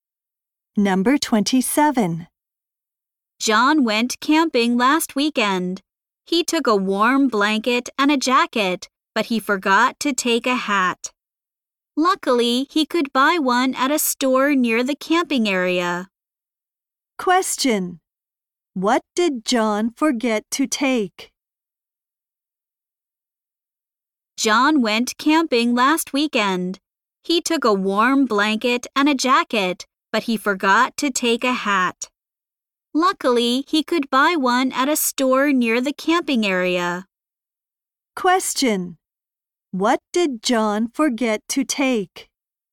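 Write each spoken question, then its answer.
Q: What did John forget to take?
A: A hat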